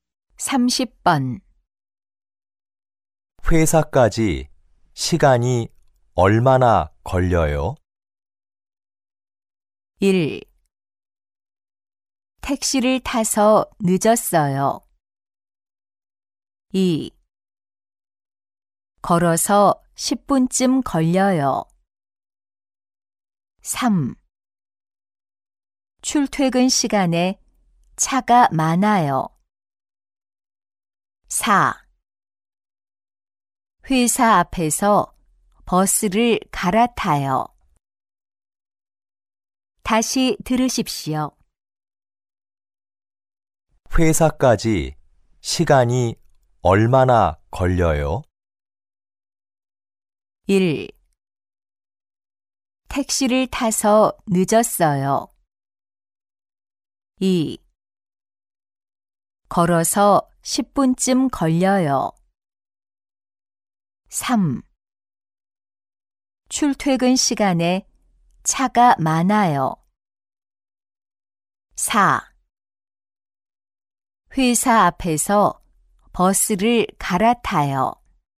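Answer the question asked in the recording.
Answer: 2: 걸어서 10분쯤 걸려요.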